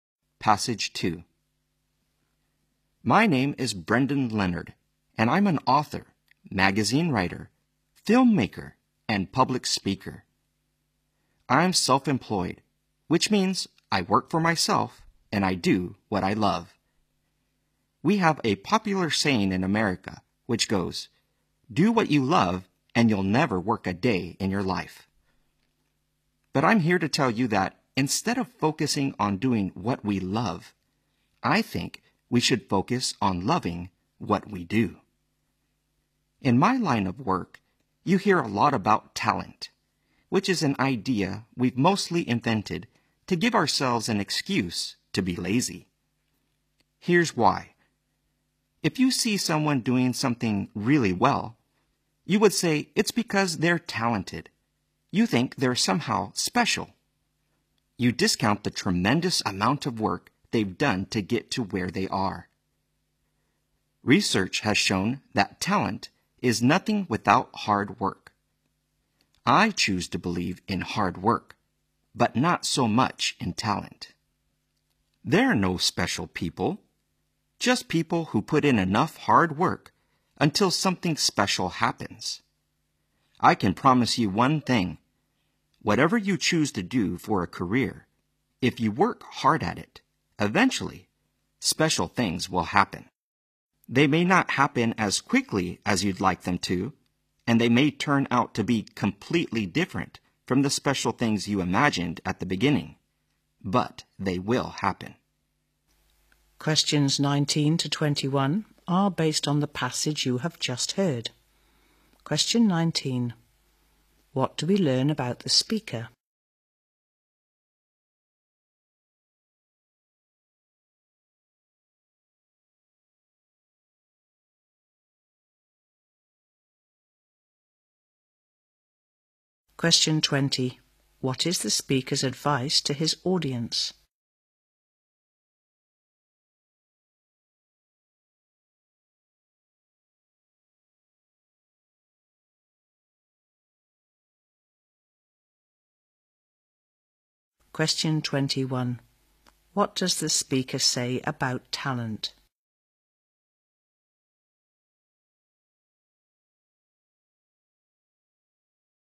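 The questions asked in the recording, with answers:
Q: What is the speaker's advice to his audience?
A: Love what you do

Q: What does the speaker say about talent?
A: It is nothing without hard work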